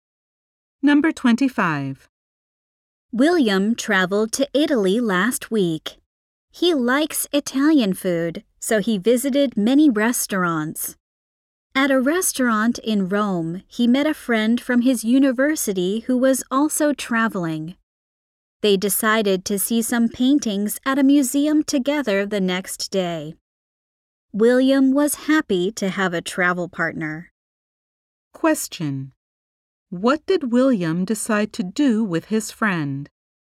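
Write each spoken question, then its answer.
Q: What did William decide to do with his friend?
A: See paintings at a museum together the next day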